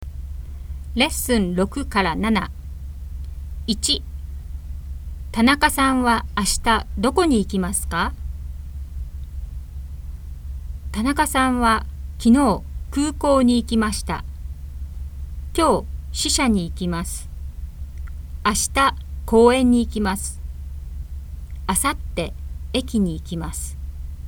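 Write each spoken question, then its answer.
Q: 田中さんは明日どこに行きますか?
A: 公園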